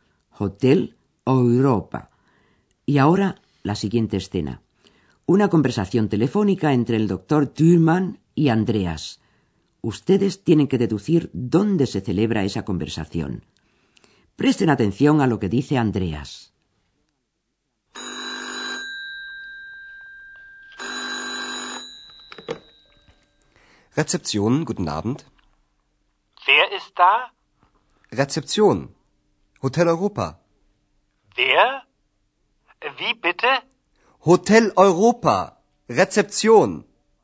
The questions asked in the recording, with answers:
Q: Ustedes tienen que deducir dónde se celebra esa conversación.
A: El curso se desarrolla, pues, en el hotel.